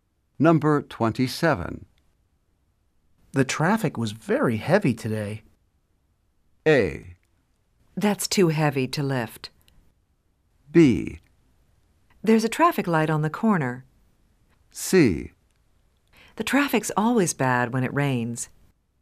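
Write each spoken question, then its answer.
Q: The traffic was very heavy today.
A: C: The traffic's always bad when it rains.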